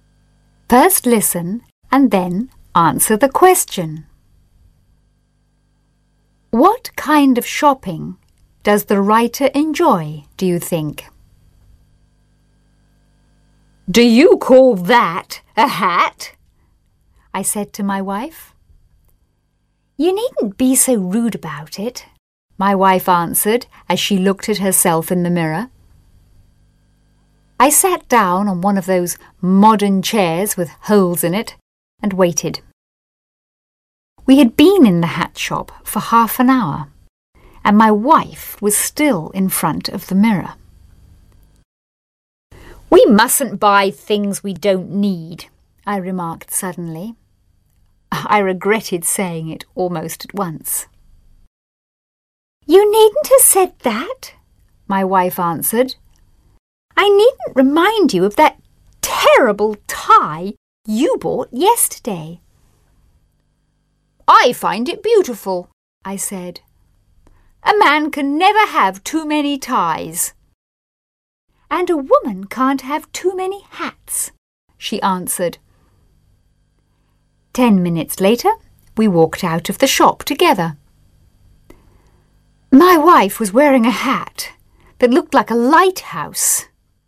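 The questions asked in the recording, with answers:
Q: What kind of shopping does the writer enjoy, do you think?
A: Buying ties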